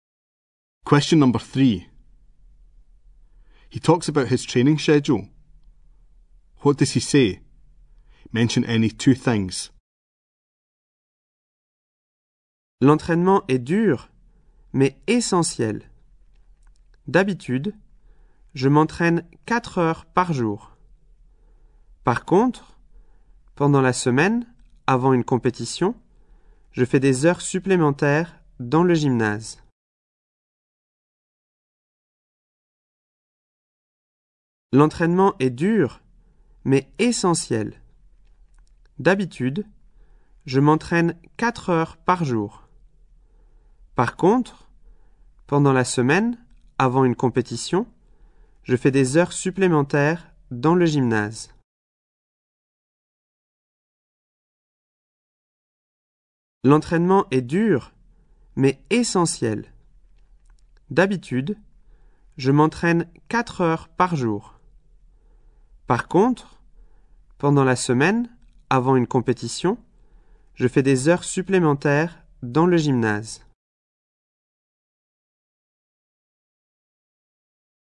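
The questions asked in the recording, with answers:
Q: What does he say? Mention any two things.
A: Training is hard but essential; usually 4 hours a day; extra hours in the gym the week before a competition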